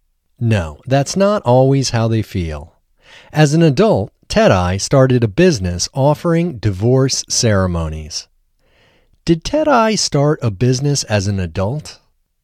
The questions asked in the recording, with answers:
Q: Did Tedai start a business as an adult?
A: Yes, as an adult, Tedai started a business.